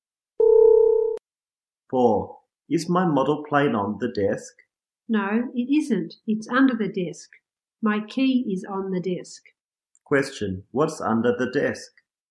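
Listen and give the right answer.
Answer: The model plane.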